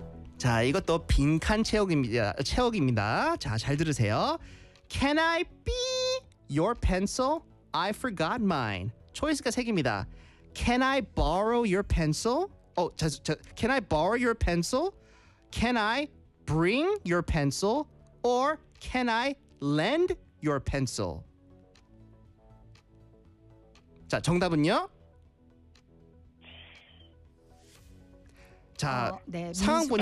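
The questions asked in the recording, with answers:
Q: Can I be your pencil? I forgot mine.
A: A: Can I borrow your pencil?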